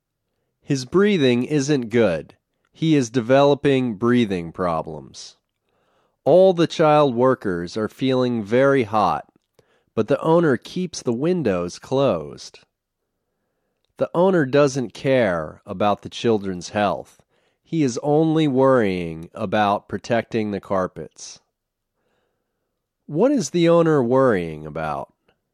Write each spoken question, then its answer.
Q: What is the owner worrying about?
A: The owner is worrying about protecting the carpets.